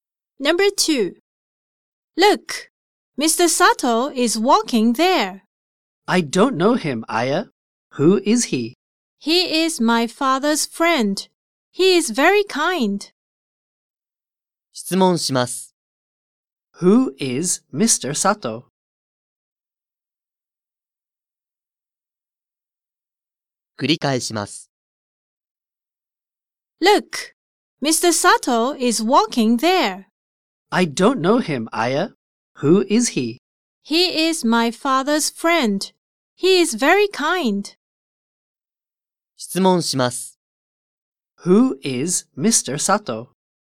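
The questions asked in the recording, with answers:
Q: Who is Mr. Sato?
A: Aya's father's friend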